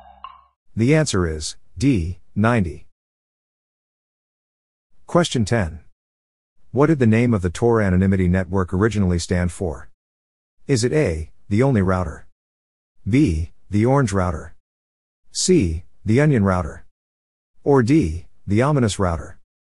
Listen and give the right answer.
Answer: The answer is C, the onion router.